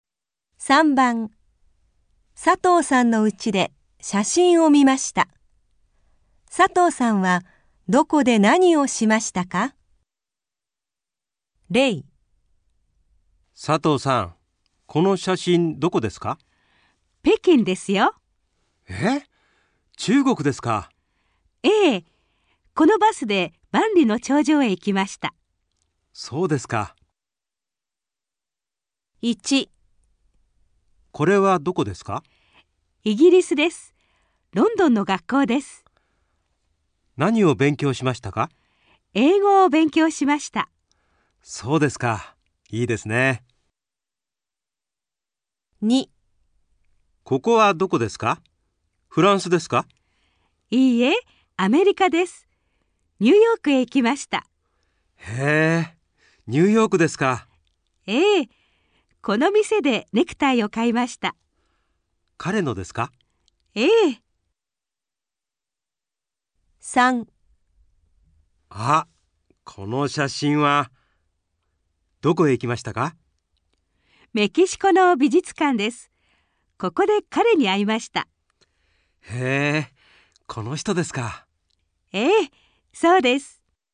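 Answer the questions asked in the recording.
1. イギリス(ロンドン)の学校で英語を勉強しました
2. アメリカ(ニューヨーク)の店でネクタイを買いました
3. メキシコの美術館で彼に会いました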